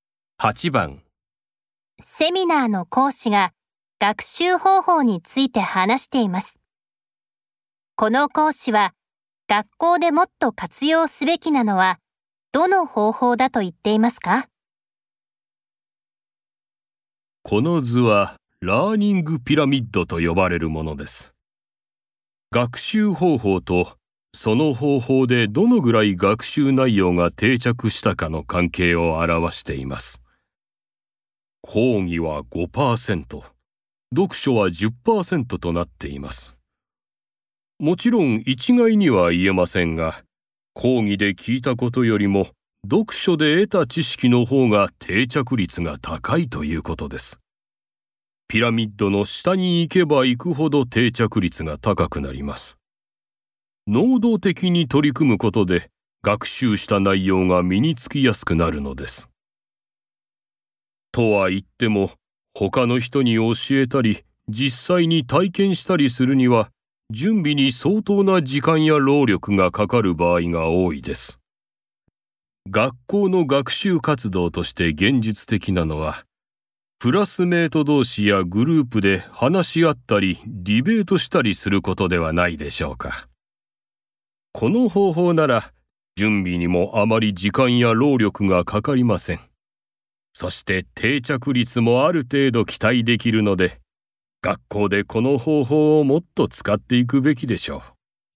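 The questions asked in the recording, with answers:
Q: この講師は学校でもっと活用すべきなのはどの方法だと言っていますか?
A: クラスメート同士やグループで話し合ったりディベートしたりすること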